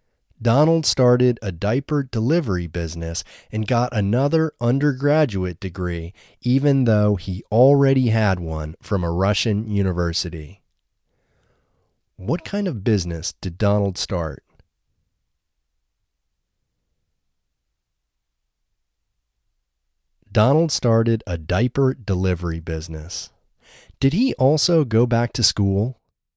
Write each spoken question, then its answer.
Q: What kind of business did Donald start?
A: Donald started a diaper delivery business.

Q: Did he also go back to school?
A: Yes, he also went back to school.